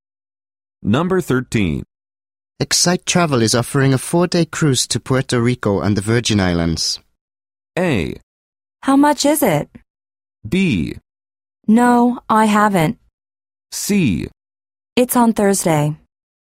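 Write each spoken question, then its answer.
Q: Excite Travel is offering a 4-day cruise to Puerto Rico and the Virgin Islands.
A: A: How much is it?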